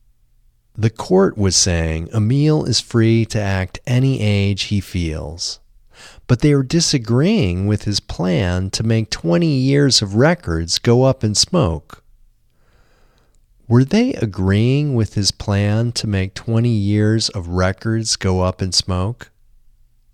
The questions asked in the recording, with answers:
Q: Were they agreeing with his plan to make 20 years of records go up in smoke?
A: No. They weren't agreeing with his plan to make 20 years of records go up in smoke.